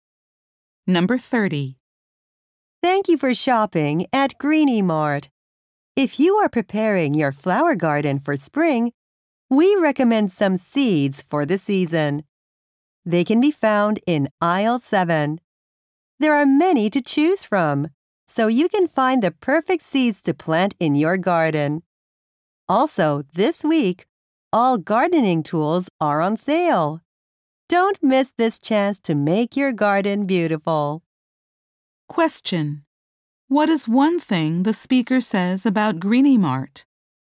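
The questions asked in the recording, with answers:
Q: What is one thing the speaker says about Greeny Mart?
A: All gardening tools are on sale this week.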